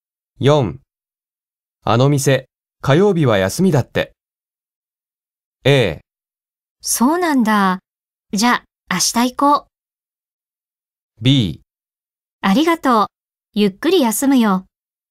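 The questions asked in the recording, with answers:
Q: あの店、火曜日は休みだって。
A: A: そうなんだ、じゃあ明日行こう。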